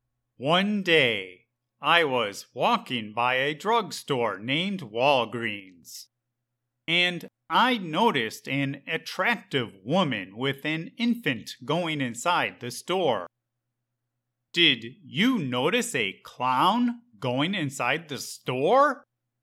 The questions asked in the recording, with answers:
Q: Did you notice a clown going inside the store?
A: No, I did not notice a clown.